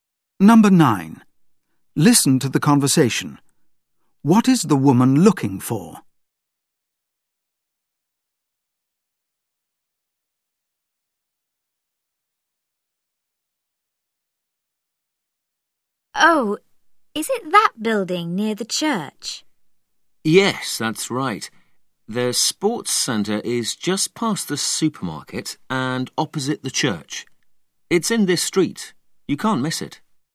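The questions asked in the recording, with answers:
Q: What is the woman looking for?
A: The sports centre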